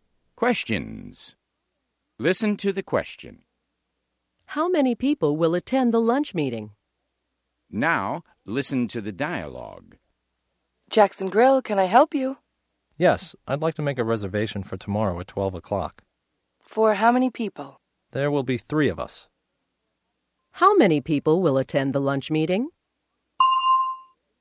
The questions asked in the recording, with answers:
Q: How many people will attend the lunch meeting?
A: There will be three people, Mr.